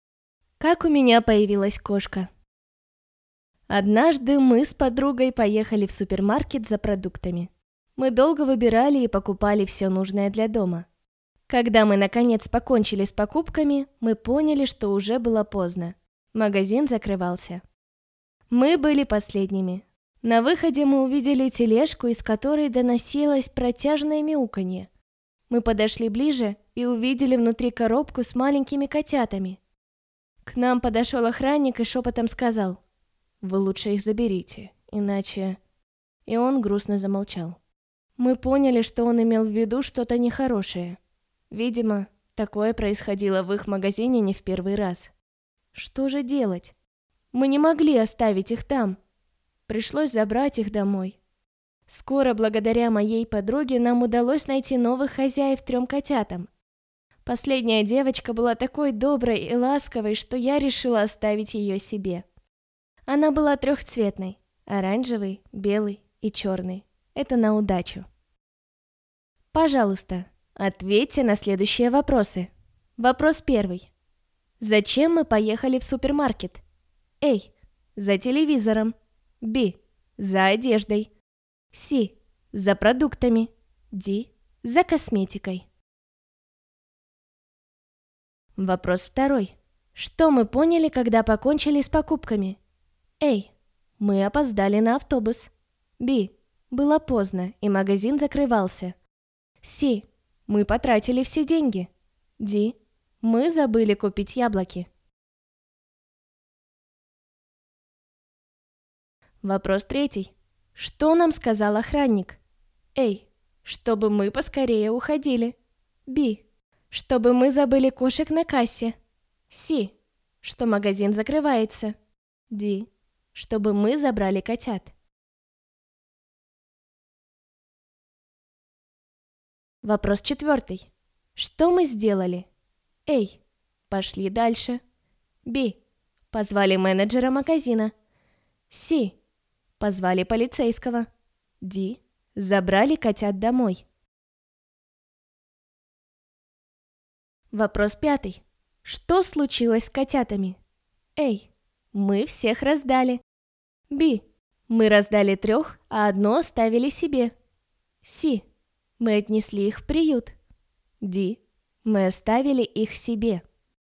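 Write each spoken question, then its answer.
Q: Зачем мы поехали в супермаркет?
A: C: за продуктами

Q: Что мы поняли, когда покончили с покупками?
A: B: было поздно, и магазин закрывался

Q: Что нам сказал охранник?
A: D: чтобы мы забрали котят

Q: Что мы сделали?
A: D: забрали котят домой

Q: Что случилось с котятами?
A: B: мы раздали трех, а одно оставили себе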